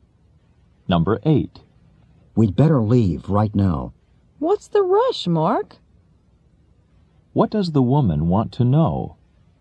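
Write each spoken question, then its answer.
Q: What does the woman want to know?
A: Why Mark is in a hurry.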